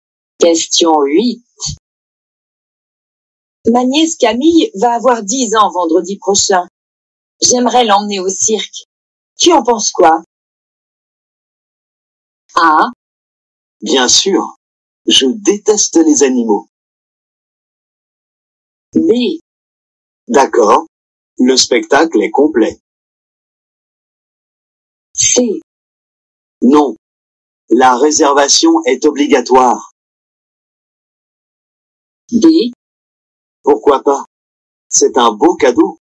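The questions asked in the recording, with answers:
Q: Tu en penses quoi?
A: D: Pourquoi pas? C'est un beau cadeau.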